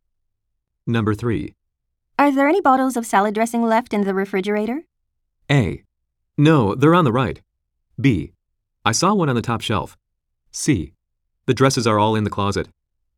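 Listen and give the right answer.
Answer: B: I saw one on the top shelf.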